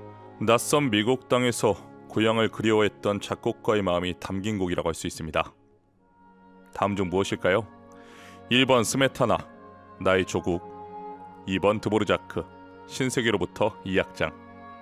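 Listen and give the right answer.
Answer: 2: 드보르자크, 신세계로부터 이 악장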